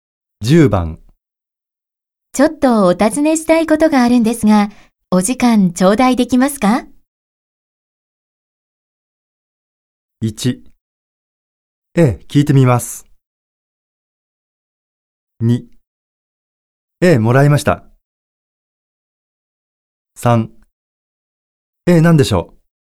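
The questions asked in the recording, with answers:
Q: ちょっとお尋ねしたいことがあるんですが、お時間頂戴できますか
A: 3: ええ、何でしょう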